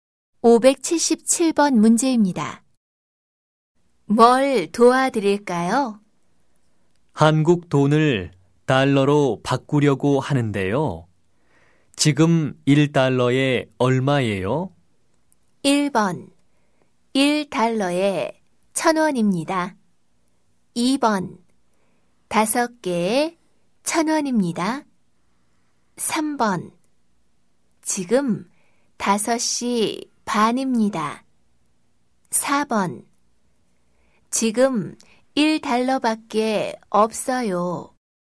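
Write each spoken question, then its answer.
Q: 한국 돈을 달러로 바꾸려고 하는데요. 지금 1달러에 얼마예요?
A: 1: 1달러에 1,000원입니다.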